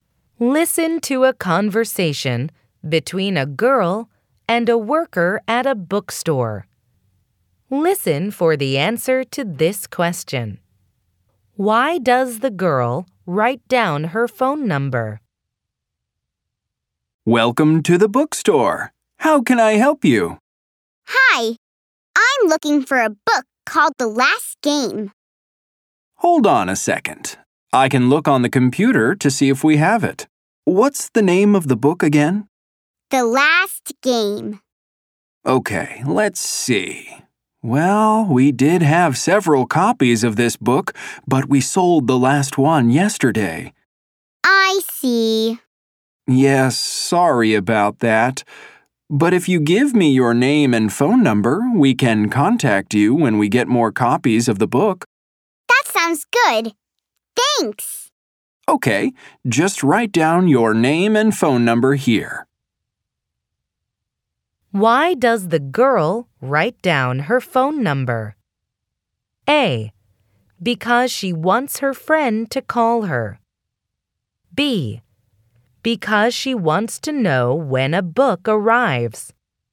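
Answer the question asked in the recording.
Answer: B: Because she wants to know when a book arrives.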